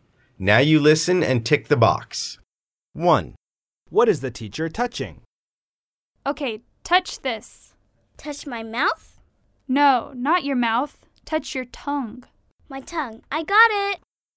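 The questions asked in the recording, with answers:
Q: What is the teacher touching?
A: tongue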